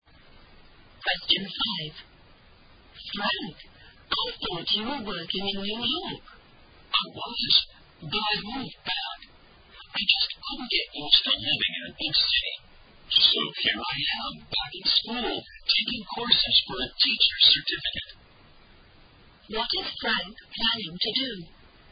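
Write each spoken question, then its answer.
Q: What is Frank planning to do?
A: Become a teacher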